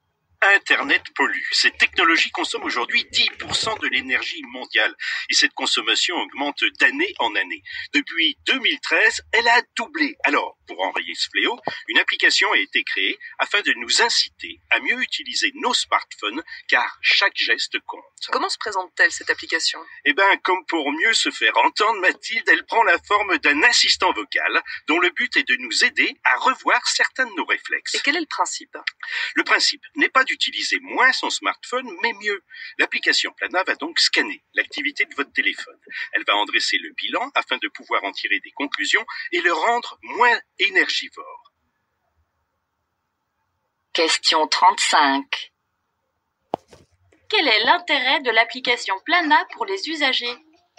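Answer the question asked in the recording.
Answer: Les aider à mieux utiliser leur smartphone pour le rendre moins énergivore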